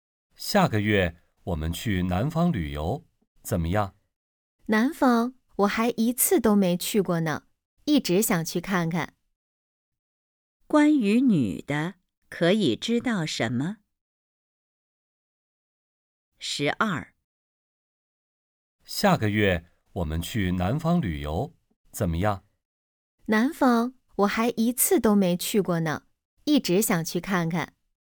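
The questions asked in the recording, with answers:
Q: 关于女的,可以知道什么?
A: 她没去过南方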